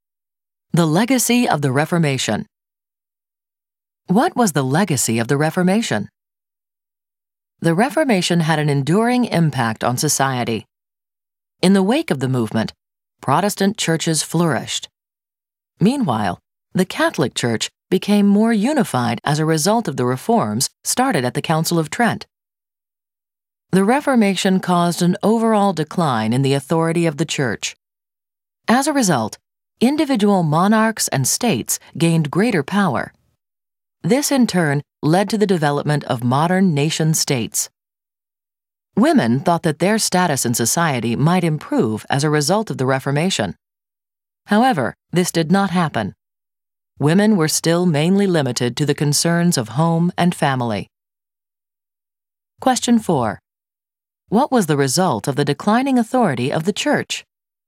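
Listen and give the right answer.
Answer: Monarchs and states gained more power, which led to modern nation-states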